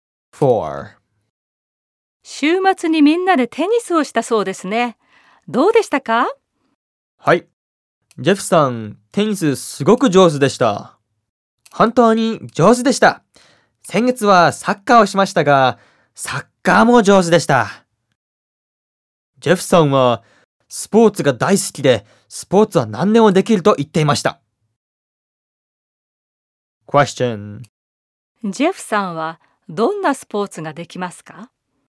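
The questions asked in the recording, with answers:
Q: ジェフさんはどんなスポーツができますか?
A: スポーツは何でもできます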